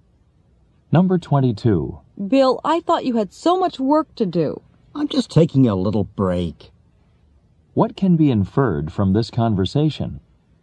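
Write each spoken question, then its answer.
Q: What can be inferred from this conversation?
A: Bill is resting briefly from his work.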